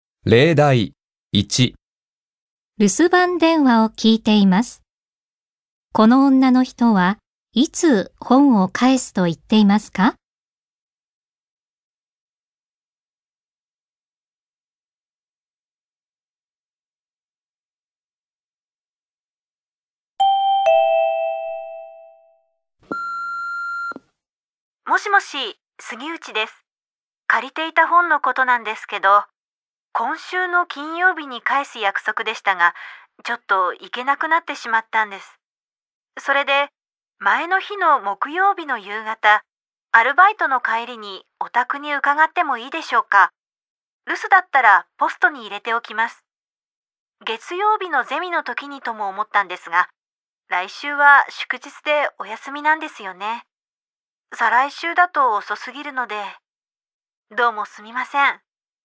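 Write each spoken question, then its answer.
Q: この女の人はいつ本を返すと言っていますか?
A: 木曜日の夕方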